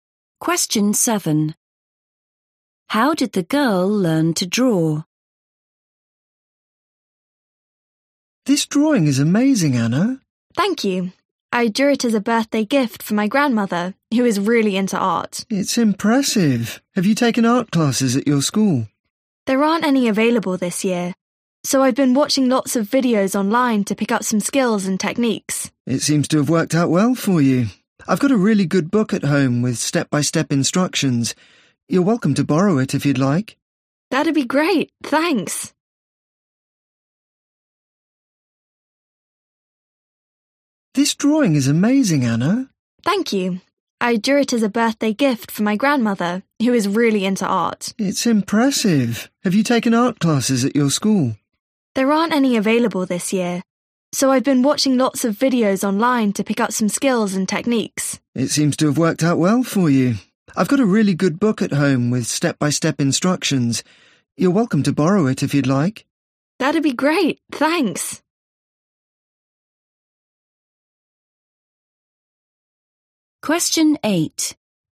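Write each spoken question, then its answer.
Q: How did the girl learn to draw?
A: By watching videos online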